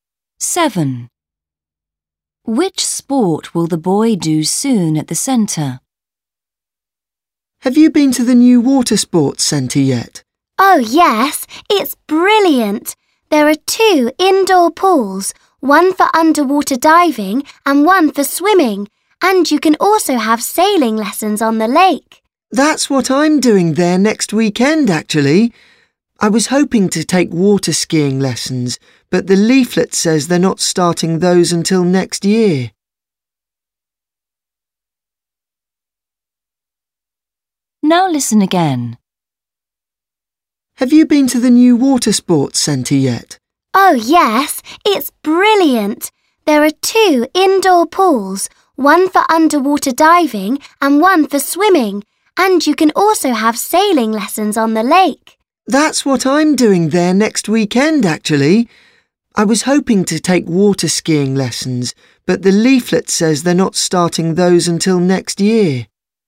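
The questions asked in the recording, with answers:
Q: Which sport will the boy do soon at the centre?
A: Sailing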